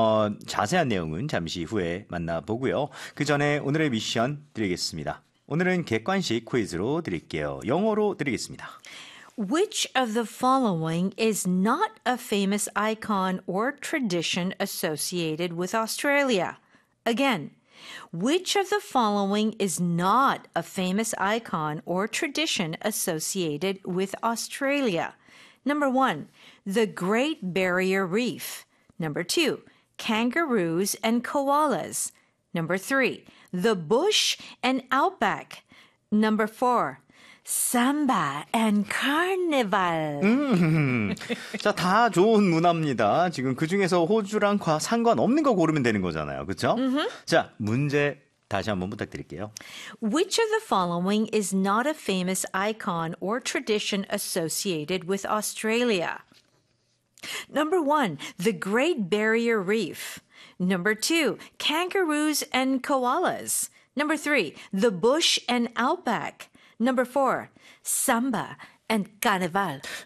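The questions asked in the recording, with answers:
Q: Which of the following is not a famous icon or tradition associated with Australia?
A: 4: samba and carnival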